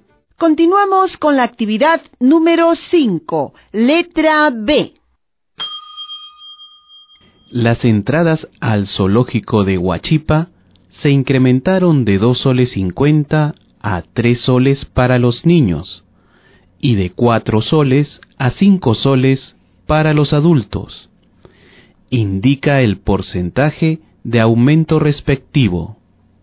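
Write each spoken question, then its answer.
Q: Indica el porcentaje de aumento respectivo.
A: 20% para los niños y 25% para los adultos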